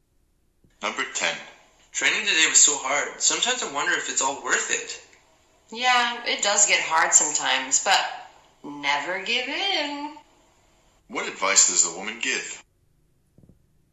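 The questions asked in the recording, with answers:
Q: What advice does the woman give?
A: Never give in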